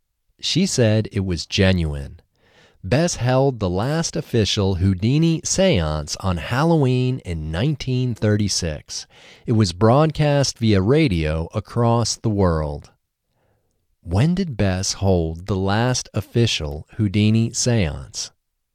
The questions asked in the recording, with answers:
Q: When did Bess hold the last official Houdini seance?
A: Bess held the last official Houdini seance on Halloween in 1936.